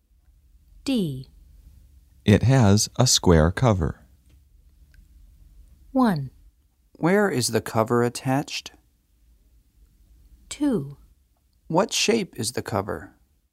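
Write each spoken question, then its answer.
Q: It has a square cover.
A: 2: What shape is the cover?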